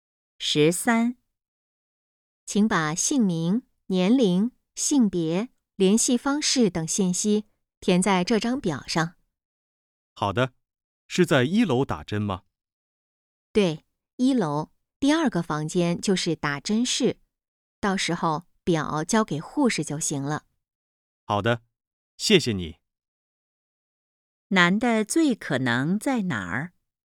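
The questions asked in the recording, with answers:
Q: 男的最可能在哪儿?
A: 医院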